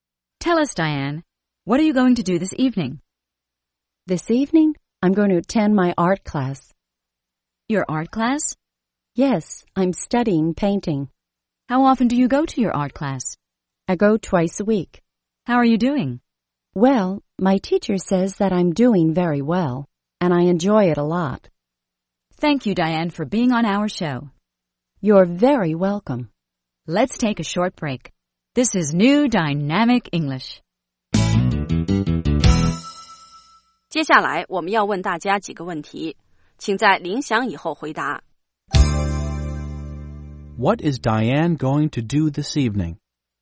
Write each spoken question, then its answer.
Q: What is Diane going to do this evening?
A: She's going to attend her art class.